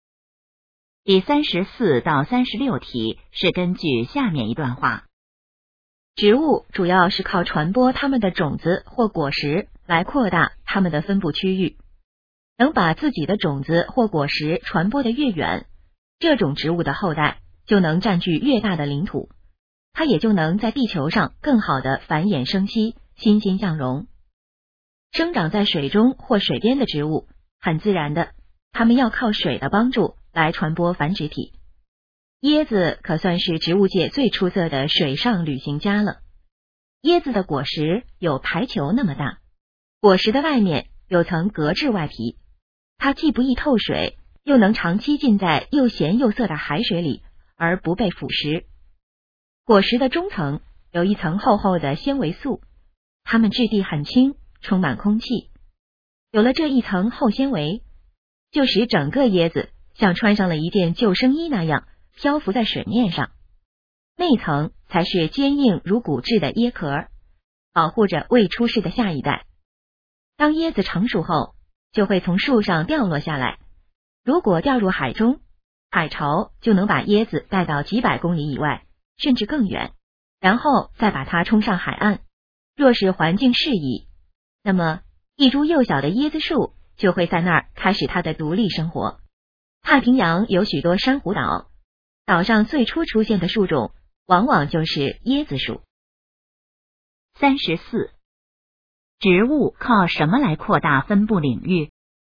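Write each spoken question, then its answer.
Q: 植物靠什么来扩大分布领域?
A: 靠传播种子或果实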